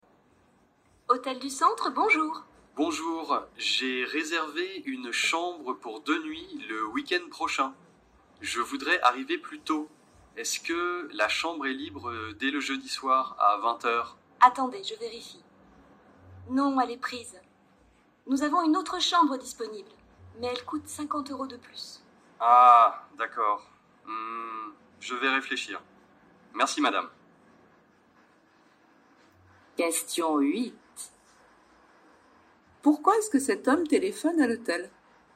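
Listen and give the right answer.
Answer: Pour arriver plus tôt (dès le jeudi soir) : il veut modifier sa réservation.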